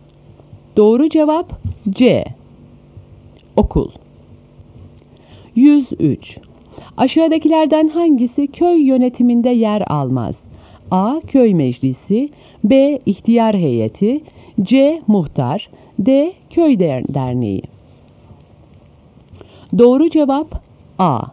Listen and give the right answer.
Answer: Doğru cevap A.